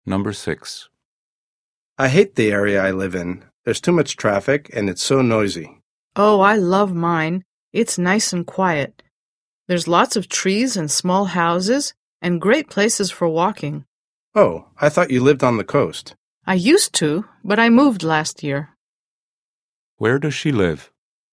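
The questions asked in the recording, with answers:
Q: Where does she live?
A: In a quiet area with lots of trees and small houses (not on the coast)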